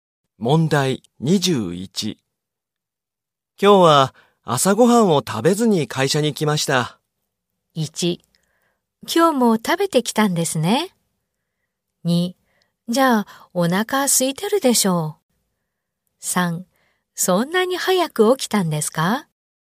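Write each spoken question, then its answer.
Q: 今日は朝ごはんを食べずに会社に来ました。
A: 3: じゃあお腹空いてるでしょう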